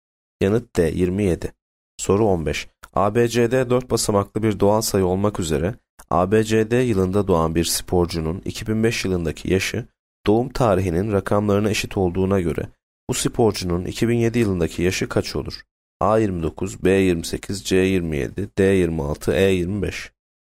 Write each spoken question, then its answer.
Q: ABCD 4 basamaklı bir doğal sayı olmak üzere ABCD yılında doğan bir sporcunun 2005 yılındaki yaşı doğum tarihinin rakamlarına eşit olduğuna göre bu sporcunun 2007 yılındaki yaşı kaç olur?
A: Yanıt B 28.